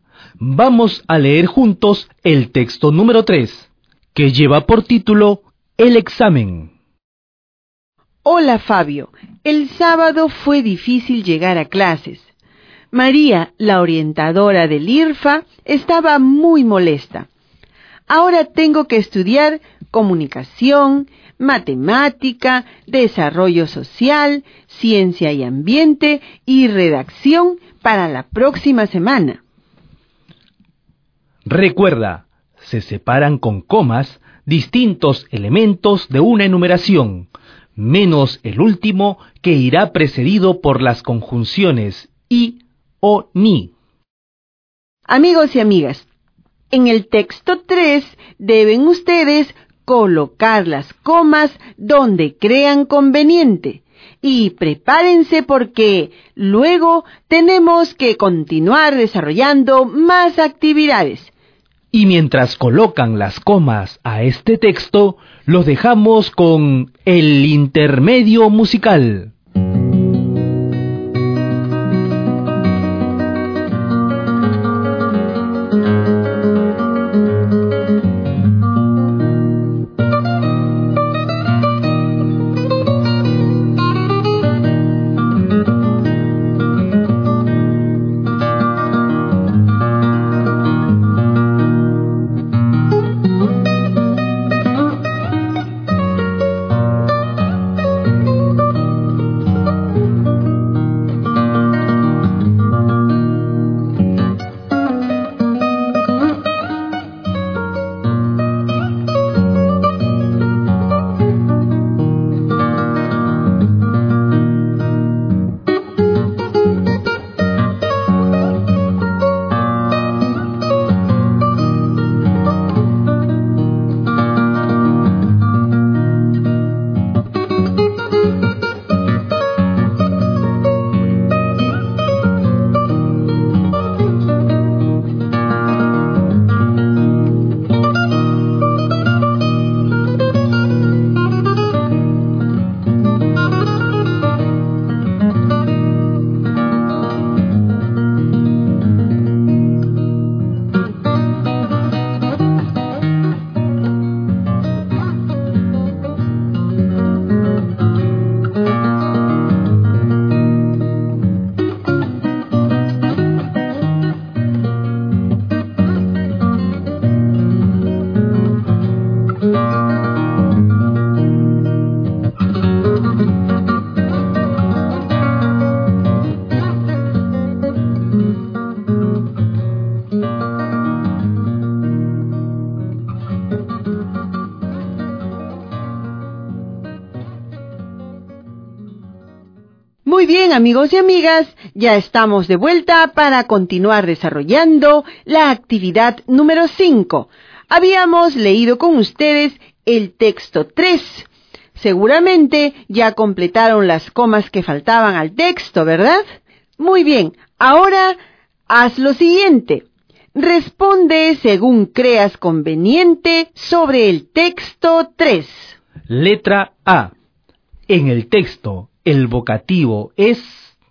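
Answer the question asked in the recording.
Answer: Fabio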